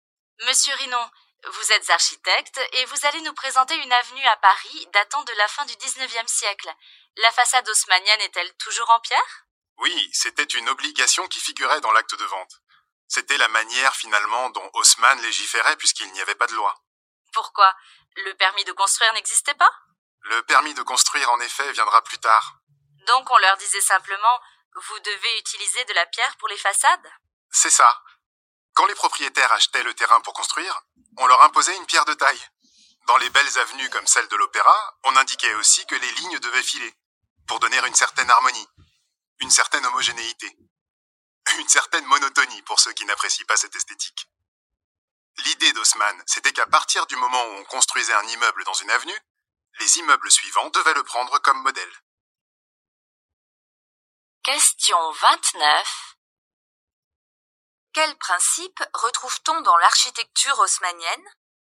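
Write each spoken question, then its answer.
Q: Quel principe retrouve-t-on dans l'architecture haussmannienne ?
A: L'homogénéité : les immeubles suivants prennent le premier comme modèle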